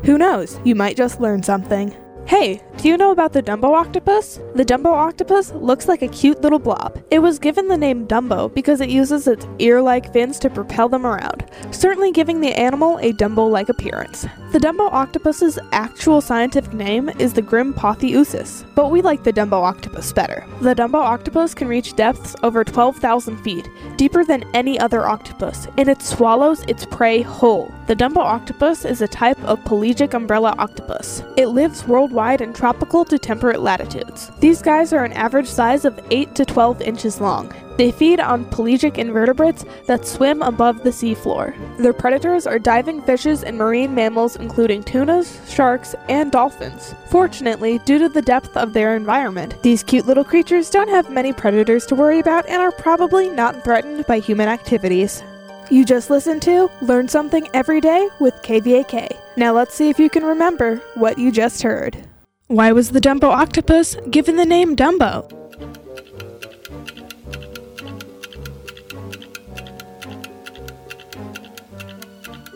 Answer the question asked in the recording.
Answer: The Dumbo octopus was given the name Dumbo because it uses its ear-like fins to propel them around, making it look like the famous Disney character.